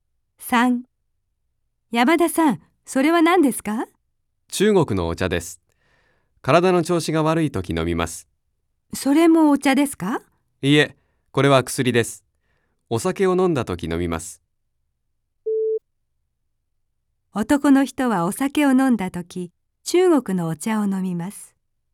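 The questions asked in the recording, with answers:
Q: 男の人はお酒を飲んだとき、中国のお茶を飲みます。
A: ×(薬を飲む)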